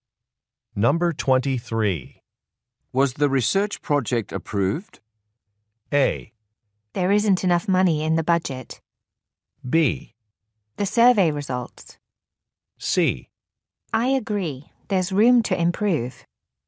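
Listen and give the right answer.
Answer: A: There isn't enough money in the budget.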